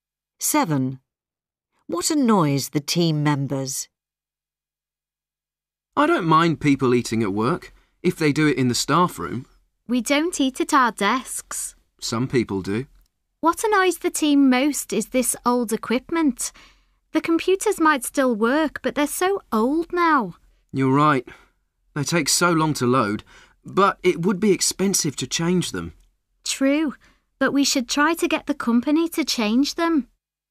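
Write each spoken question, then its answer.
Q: What annoys the team members?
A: the old equipment (old computers)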